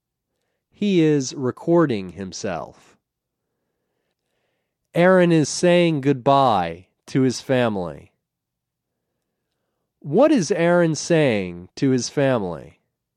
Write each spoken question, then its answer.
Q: What is Aaron saying to his family?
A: Aaron is saying goodbye to his family.